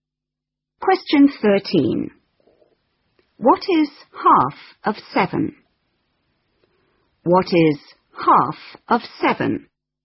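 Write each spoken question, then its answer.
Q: What is half of 7?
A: 3.5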